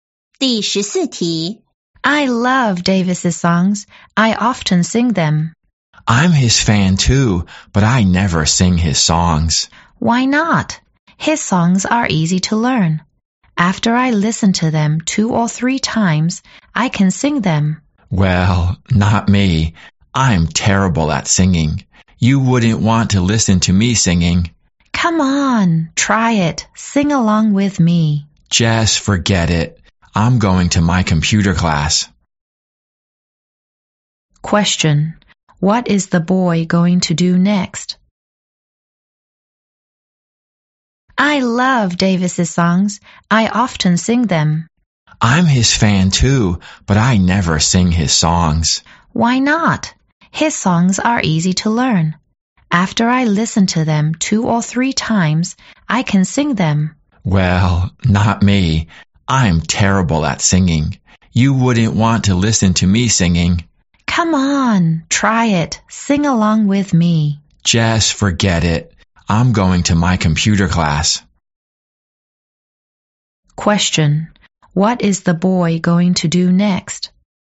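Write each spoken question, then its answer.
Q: What is the boy going to do next?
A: Go to his computer class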